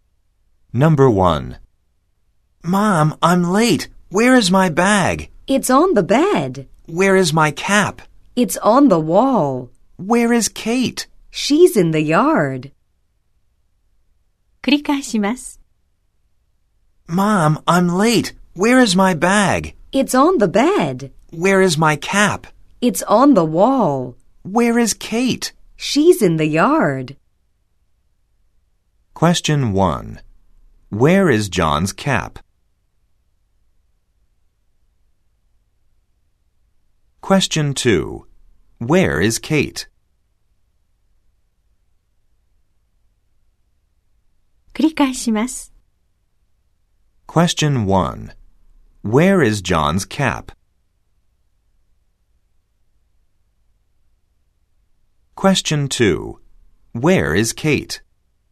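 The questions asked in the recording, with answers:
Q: Where is John's cap?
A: It's on the wall.

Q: Where is Kate?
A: She's in the yard.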